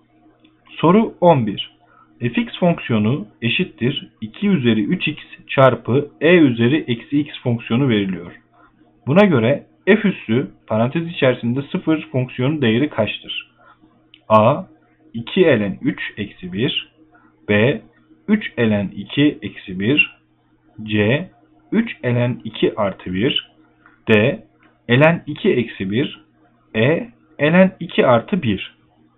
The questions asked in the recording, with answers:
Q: Buna göre f üssü parantez içerisinde 0 fonksiyonu değeri kaçtır?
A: Doğru yanıt B 3 ln 2 eksi 1.